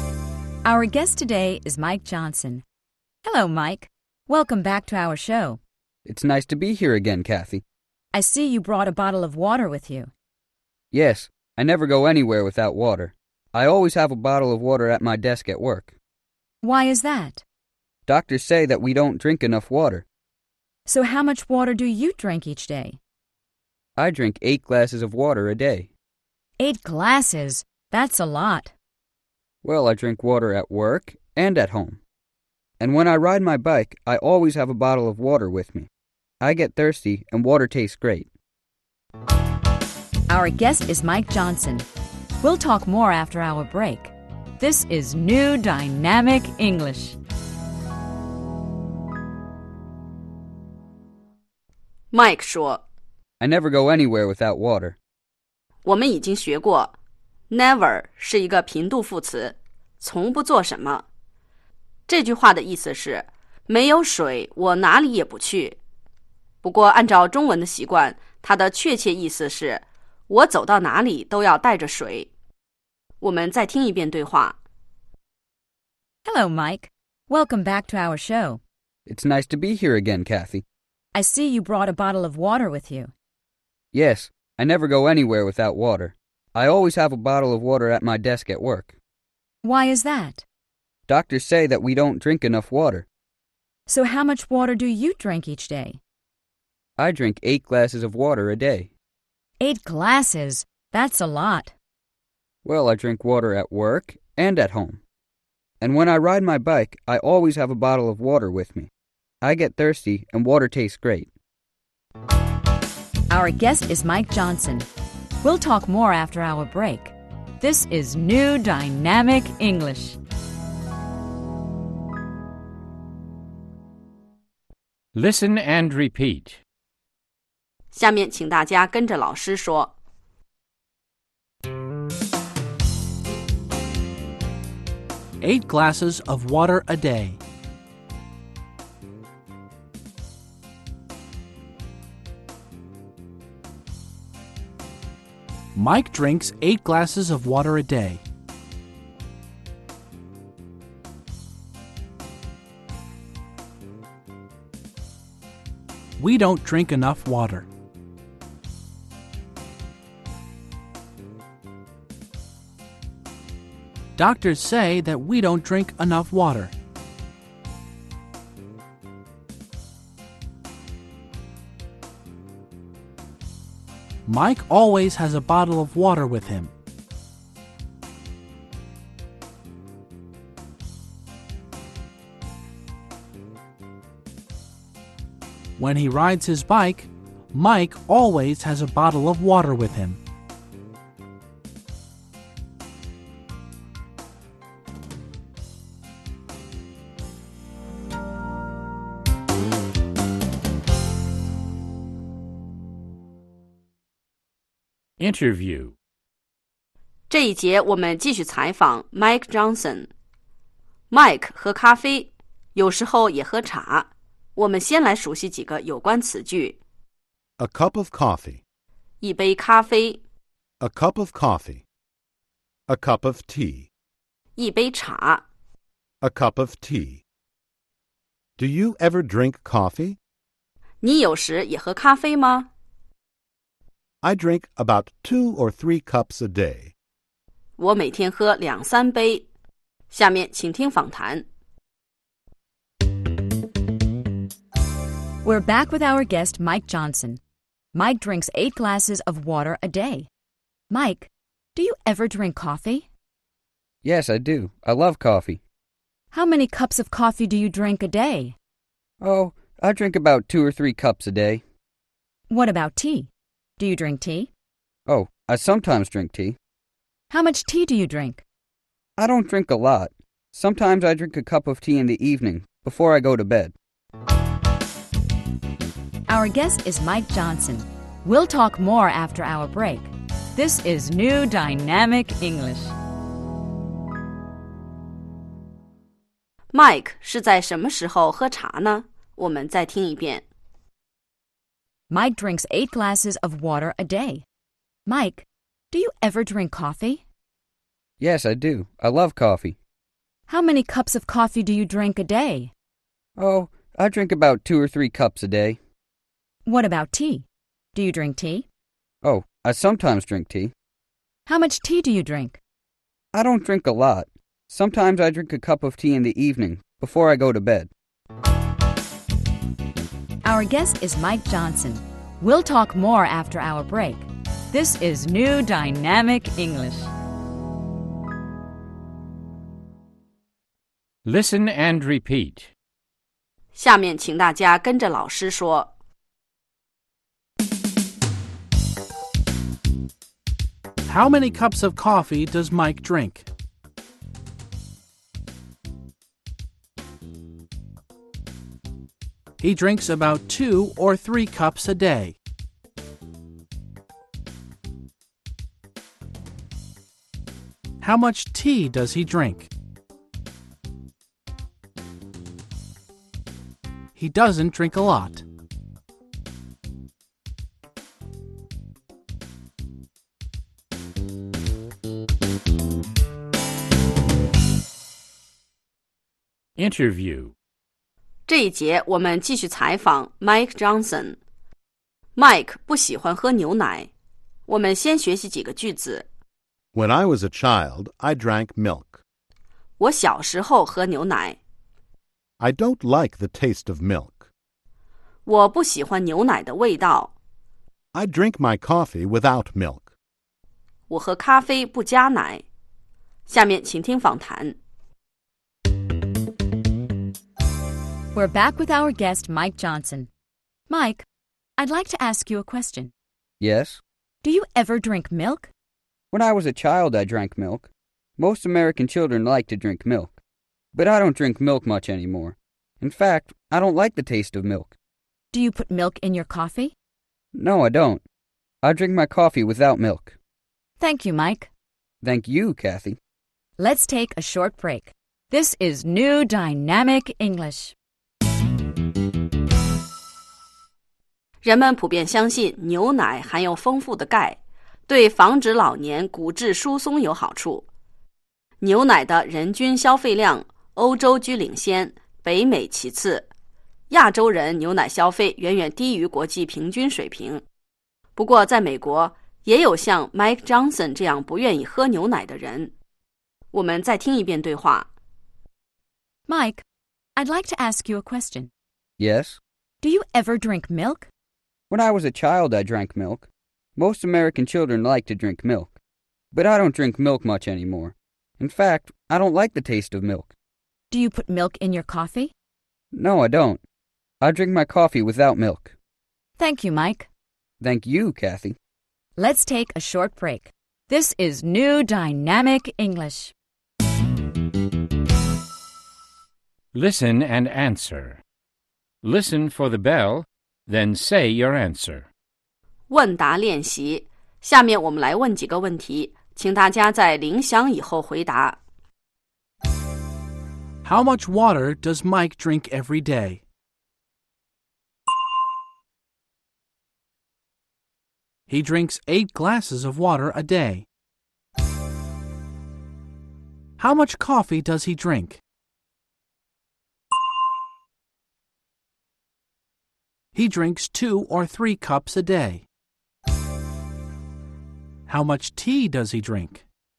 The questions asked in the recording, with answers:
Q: How much water does Mike drink every day?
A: He drinks 8 glasses of water a day.

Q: How much tea does he drink?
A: He doesn't drink a lot.